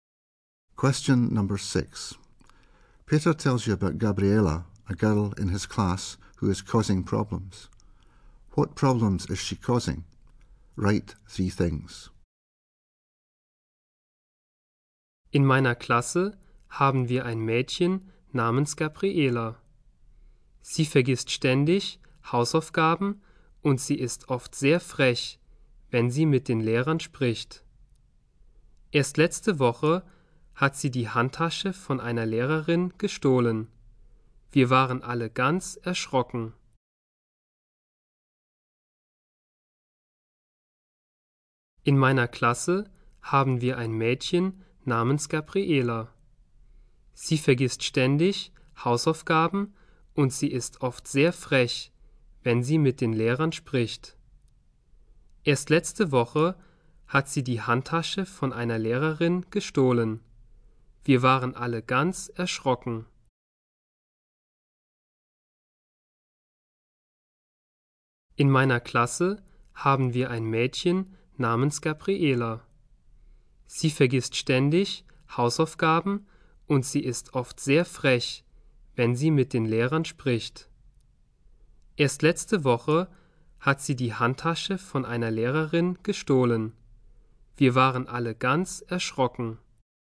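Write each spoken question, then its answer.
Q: What problems is she causing?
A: Always forgets homework; cheeky to teachers; stole a teacher's handbag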